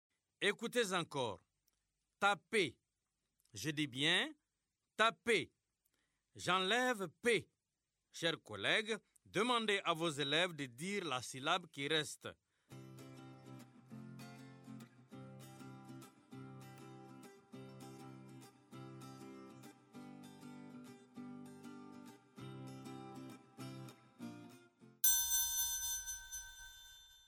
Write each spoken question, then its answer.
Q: J'enlève p. Chers collègues, demandez à vos élèves de dire la syllabe qui reste.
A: Il reste ta.